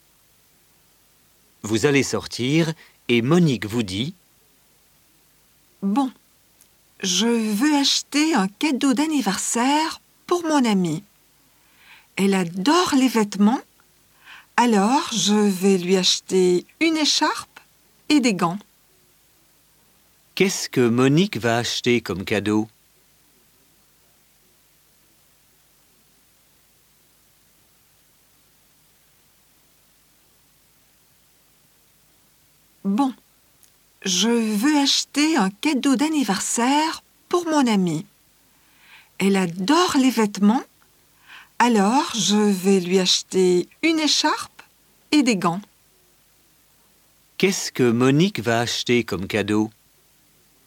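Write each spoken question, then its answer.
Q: Qu'est-ce que Monique va acheter comme cadeau?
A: Une écharpe et des gants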